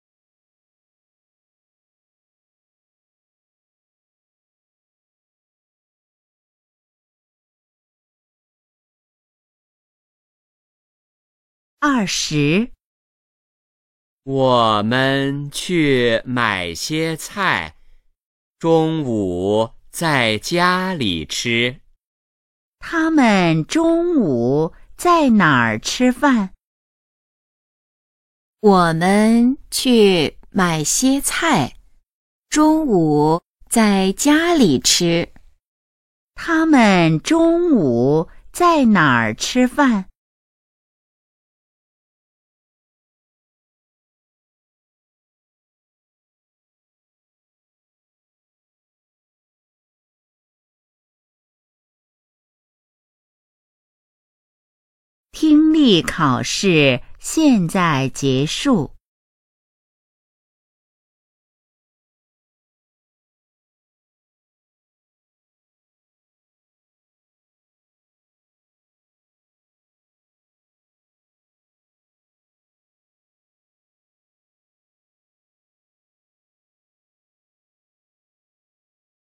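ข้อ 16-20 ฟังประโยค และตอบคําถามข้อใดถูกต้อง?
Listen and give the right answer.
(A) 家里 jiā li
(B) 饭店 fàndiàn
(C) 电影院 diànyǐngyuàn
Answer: (A) 家里 jiā li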